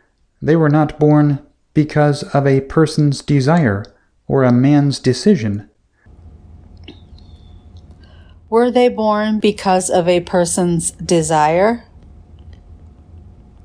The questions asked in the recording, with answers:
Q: Were they born because of a person's desire?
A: No, they weren't.